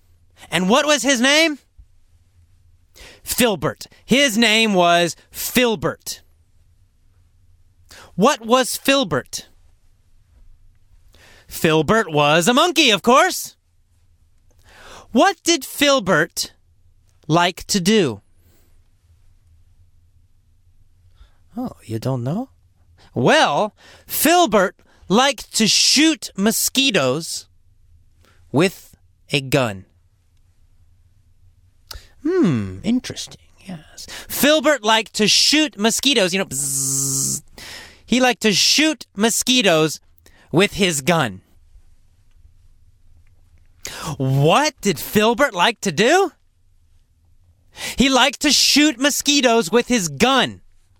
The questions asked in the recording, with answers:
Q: What did Filbert like to do?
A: He liked to shoot mosquitoes with his gun.